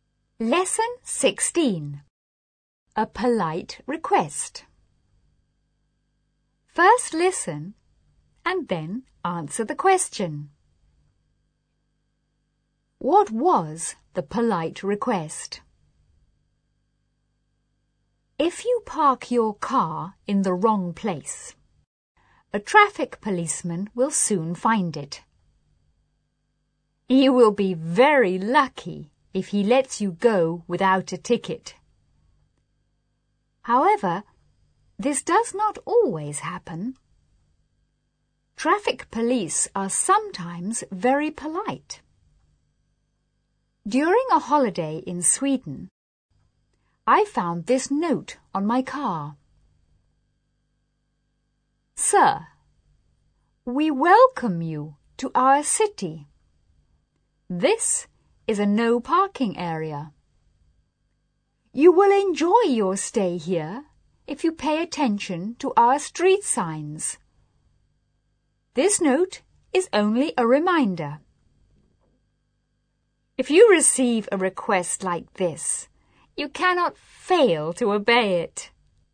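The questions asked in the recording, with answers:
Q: What was the polite request?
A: To pay attention to the street signs and not park in a no parking area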